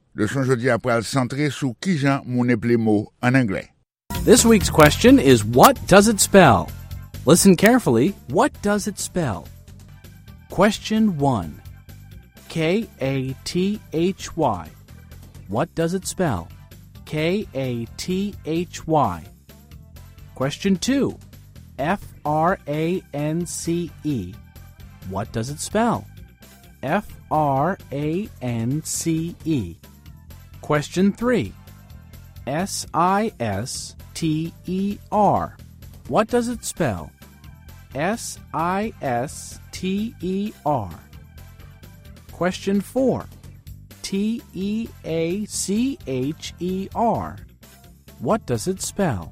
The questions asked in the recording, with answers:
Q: K-A-T-H-Y. What does it spell?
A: That spells Kathy.

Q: France. What does it spell?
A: it spells France.

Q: Sister. What does it spell?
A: it spells sister.